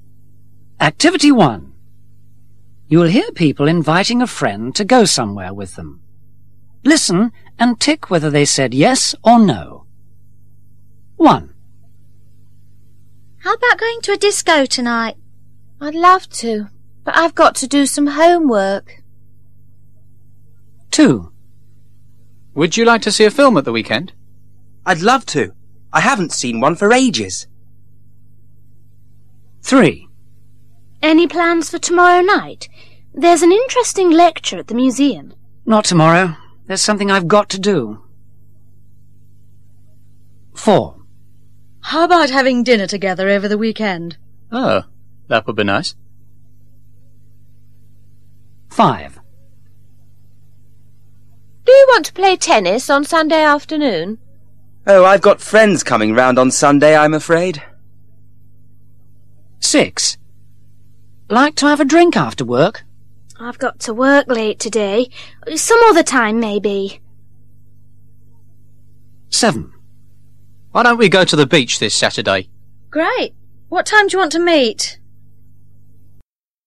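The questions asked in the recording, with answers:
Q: How about going to a disco tonight?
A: No

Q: Would you like to see a film at the weekend?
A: Yes

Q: Any plans for tomorrow night?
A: No

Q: How about having dinner together over the weekend?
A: Yes

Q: Do you want to play tennis on Sunday afternoon?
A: No

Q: Like to have a drink after work?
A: No

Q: Why don't we go to the beach this Saturday?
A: Yes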